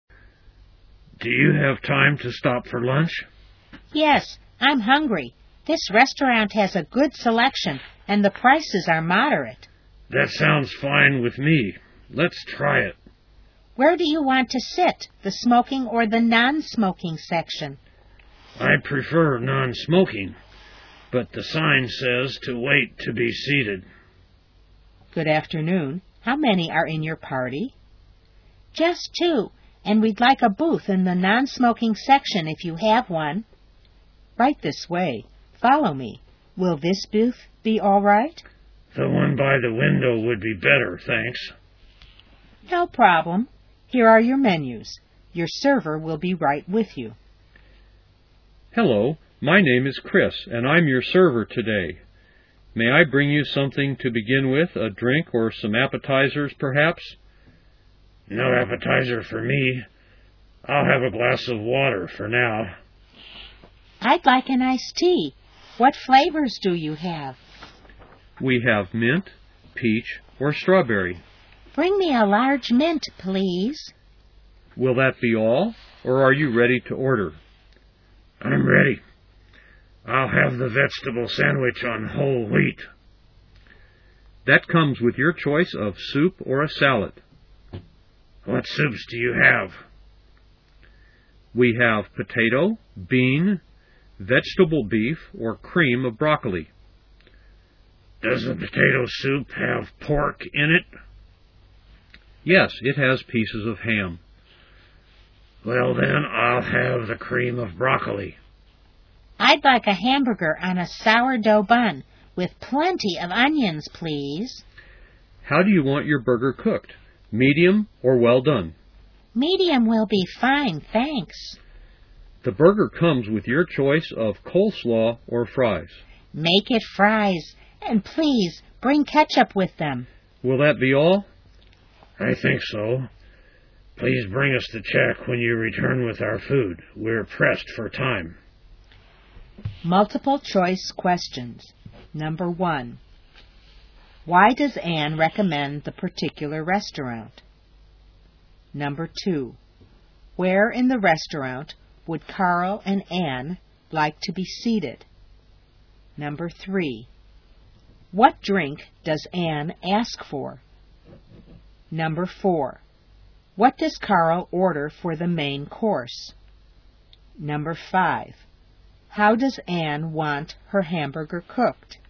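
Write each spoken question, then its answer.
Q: Why does Anne recommend the particular restaurant?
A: It has a good selection and moderate prices

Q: Where in the restaurant would Carl and Anne like to be seated?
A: In a booth by the window in the non-smoking section

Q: How does Anne want her hamburger cooked?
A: Medium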